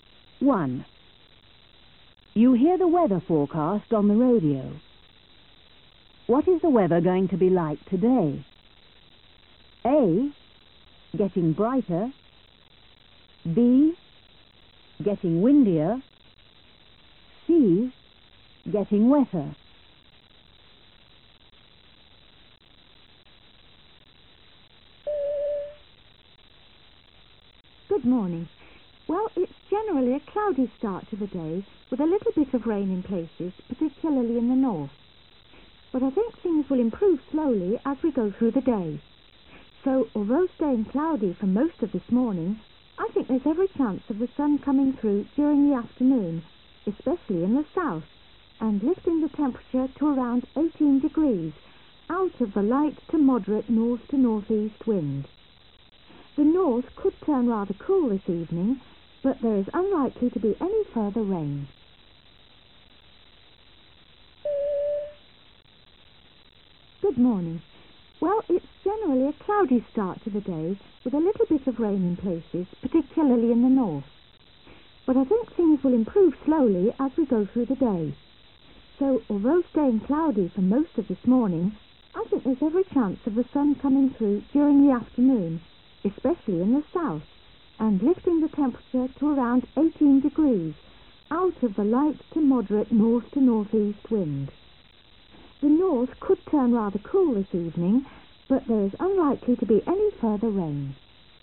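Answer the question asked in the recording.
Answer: A: getting brighter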